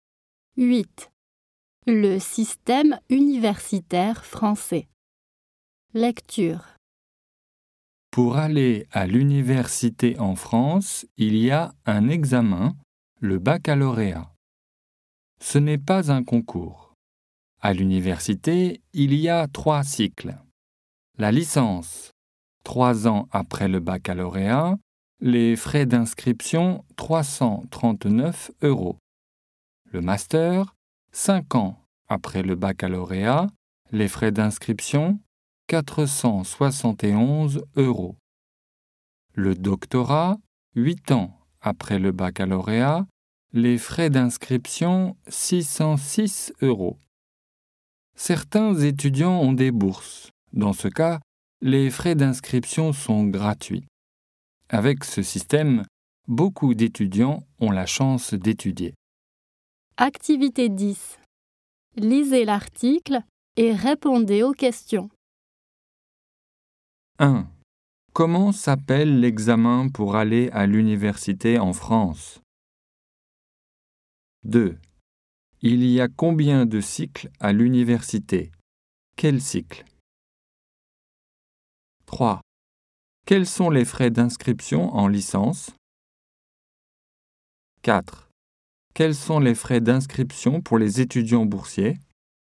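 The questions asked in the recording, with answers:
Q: Comment s'appelle l'examen pour aller à l'université en France?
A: le baccalauréat

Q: Il y a combien de cycles à l'université?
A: 3 cycles

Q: Quels sont les frais d'inscription en licence?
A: 339 euros

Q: Quels sont les frais d'inscription pour les étudiants boursiers ?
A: gratuits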